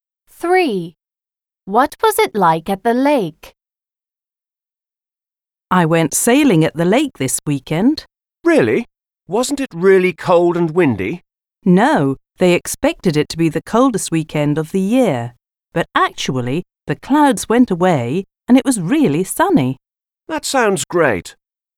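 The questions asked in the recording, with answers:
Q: What was it like at the lake?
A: sunny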